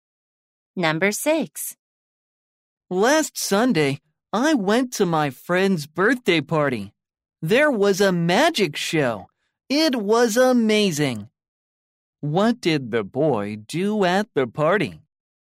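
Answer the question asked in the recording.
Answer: He watched a magic show.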